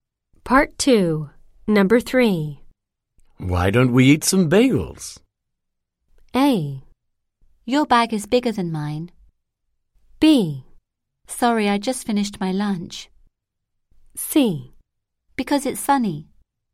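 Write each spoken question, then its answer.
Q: Why don't we eat some bagels?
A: B: Sorry, I just finished my lunch.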